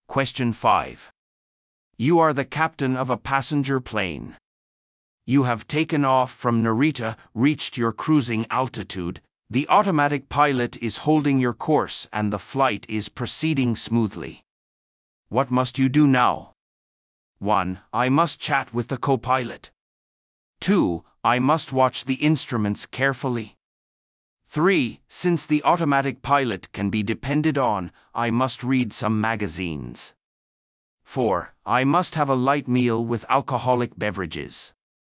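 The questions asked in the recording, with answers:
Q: What must you do now?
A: 2: I must watch the instruments carefully.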